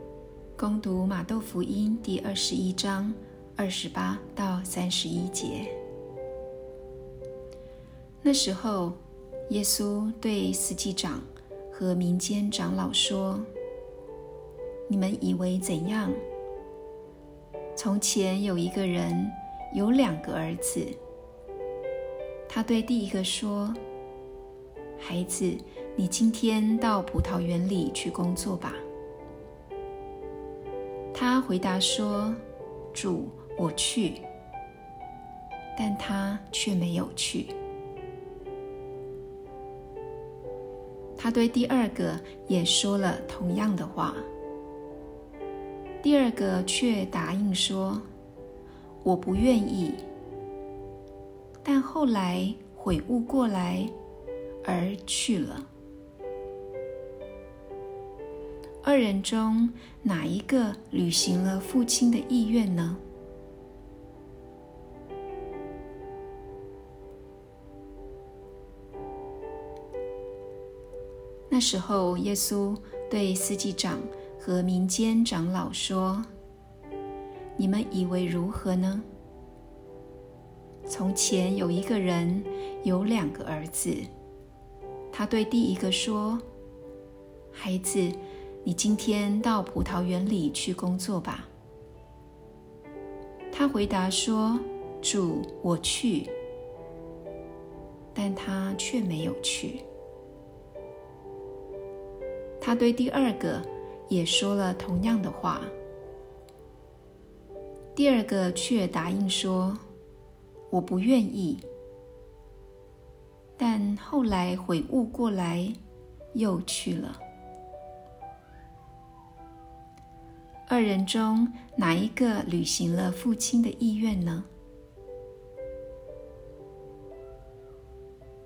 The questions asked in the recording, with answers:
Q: 二人中哪一个履行了父亲的意愿呢?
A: 履行父亲意愿的是那个最后去了葡萄园的儿子。